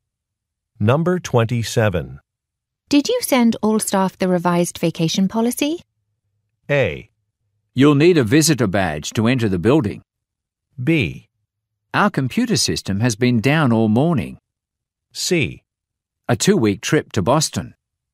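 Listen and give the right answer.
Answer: B: Our computer system has been down all morning.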